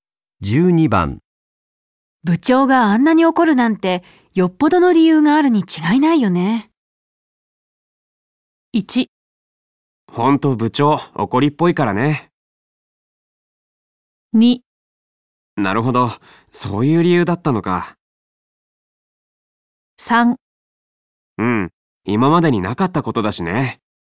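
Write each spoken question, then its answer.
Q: 部長があんなに怒るなんてよっぽどの理由があるに違いないよね。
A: 3: うん今までになかったことだしね。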